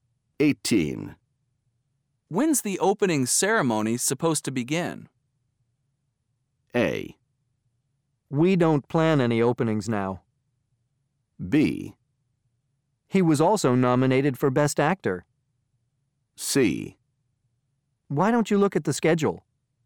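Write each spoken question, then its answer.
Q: When's the opening ceremony supposed to begin?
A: C: Why don't you look at the schedule?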